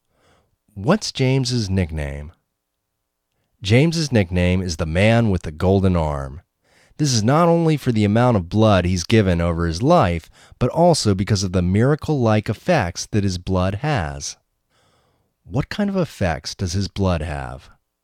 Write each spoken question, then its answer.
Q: What kind of effects does his blood have?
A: His blood has miracle-like effects.